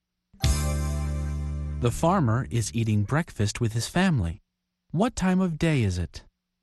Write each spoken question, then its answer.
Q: What time of day is it?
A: It's morning.